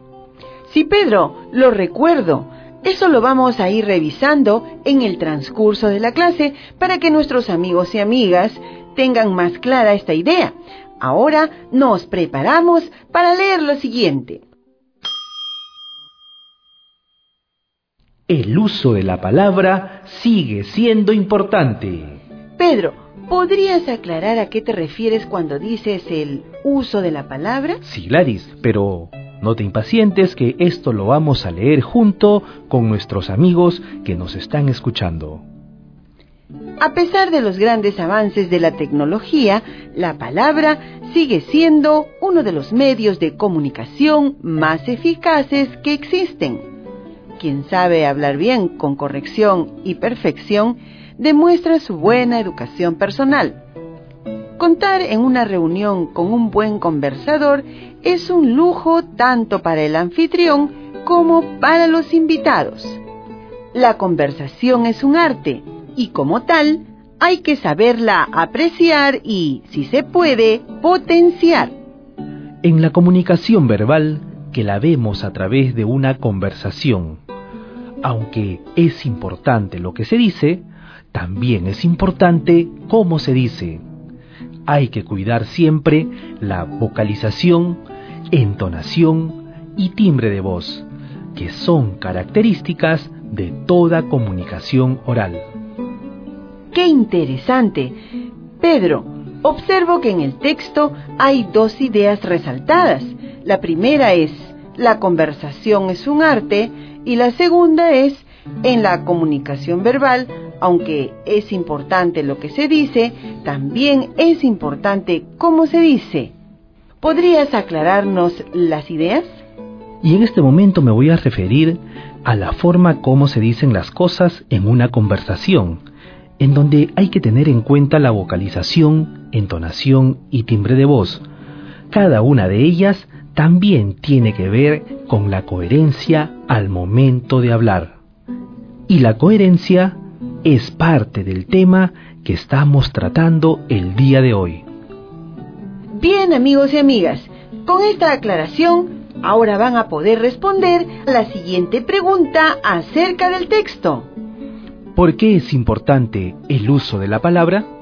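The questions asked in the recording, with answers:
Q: ¿Por qué es importante el uso de la palabra?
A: Porque, a pesar de los avances de la tecnología, la palabra sigue siendo uno de los medios de comunicación más eficaces, y hablar bien demuestra buena educación personal.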